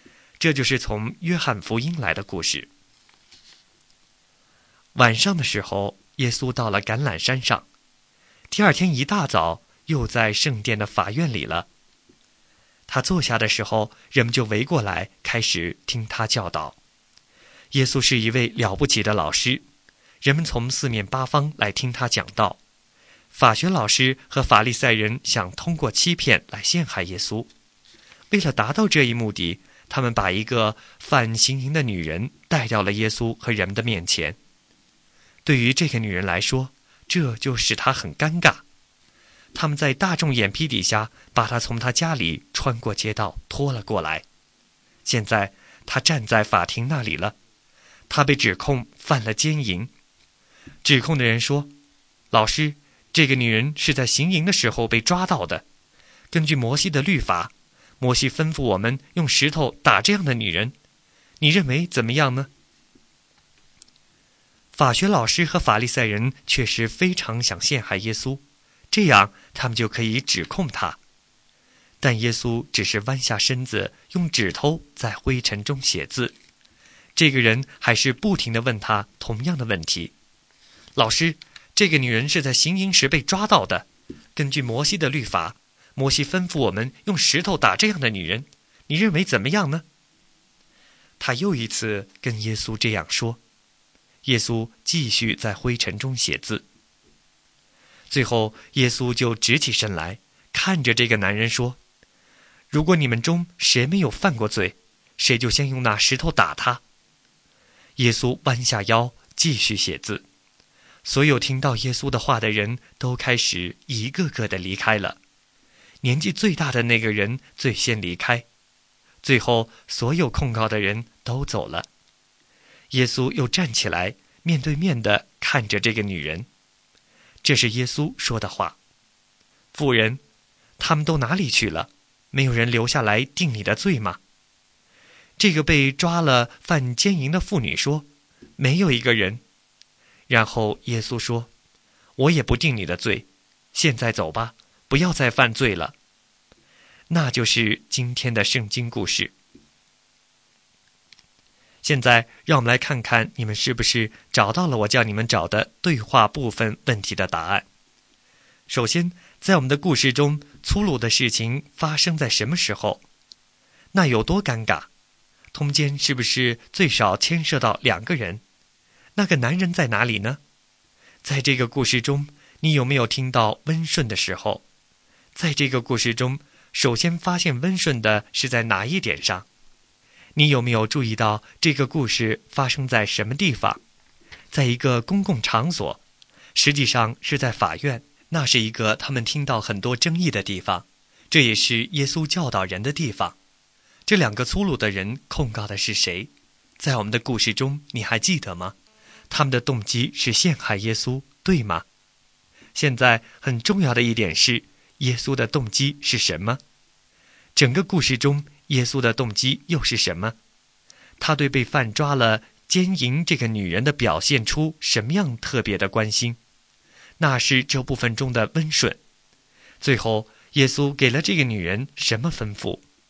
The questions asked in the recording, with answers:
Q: 最后,耶稣给了这个女人什么吩咐?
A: 离开者不要再犯罪了